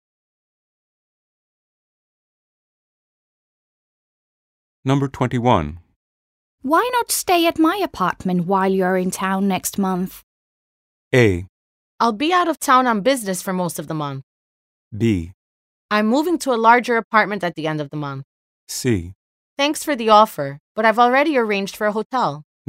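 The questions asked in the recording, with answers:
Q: Why not stay at my apartment while you're in town next month?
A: C: Thanks for the offer, but I've already arranged for a hotel.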